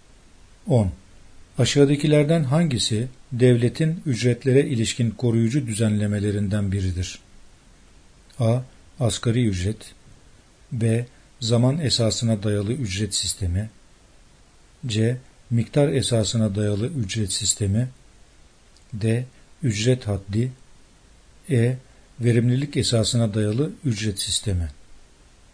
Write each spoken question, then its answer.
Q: Aşağıdakilerden hangisi devletin ücretlere ilişkin koruyucu düzenlemelerinden biridir?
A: Yanıt A. Asgari ücret.